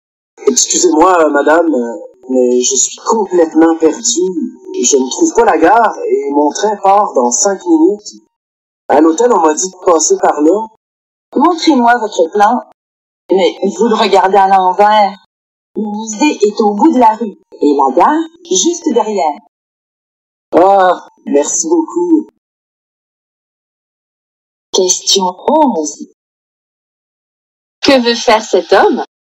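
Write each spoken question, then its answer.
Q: Que veut faire cet homme?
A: Aller à la gare pour prendre son train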